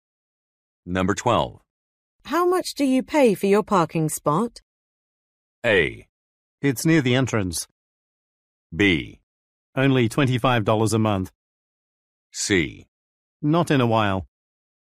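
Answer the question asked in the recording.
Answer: B: Only $25 a month.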